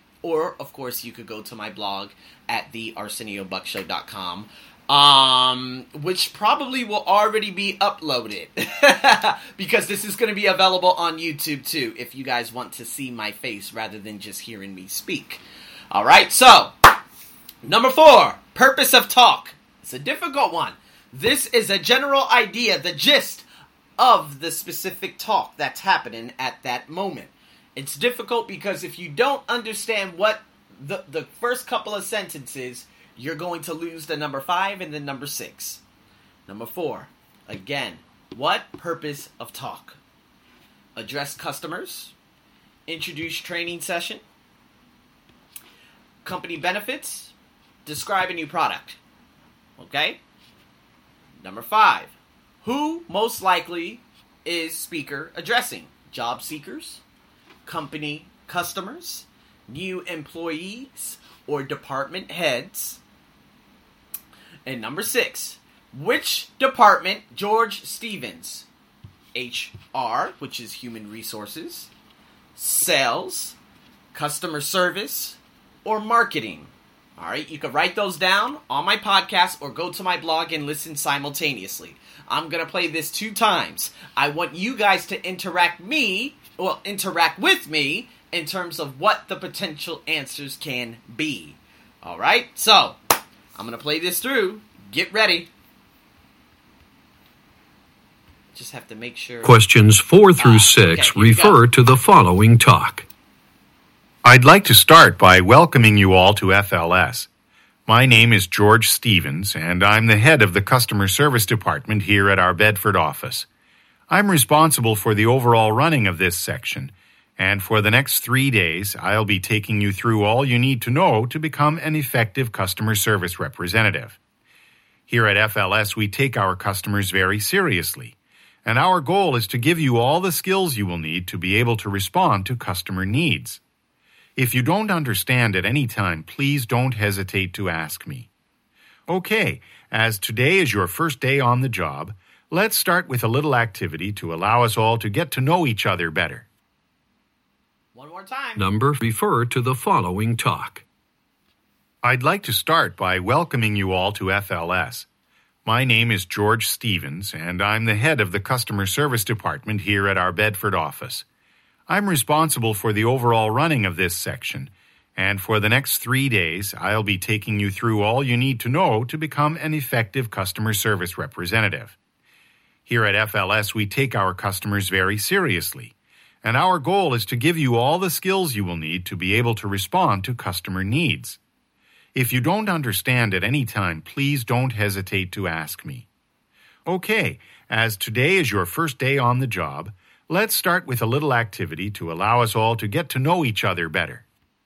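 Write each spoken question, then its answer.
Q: what purpose of talk?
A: B: introduce training session

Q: who most likely is speaker addressing?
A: C: new employees

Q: which department George Stevens, HR, which is human resources, sales, customer service, or marketing?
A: C: customer service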